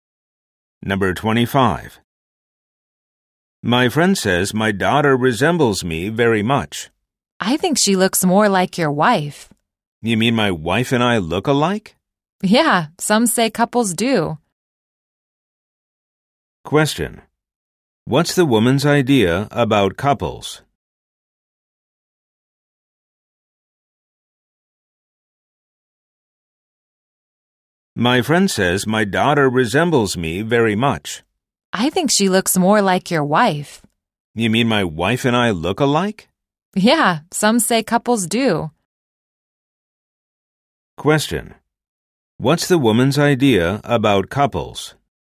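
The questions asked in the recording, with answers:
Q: What's the woman's idea about couples?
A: Couples look alike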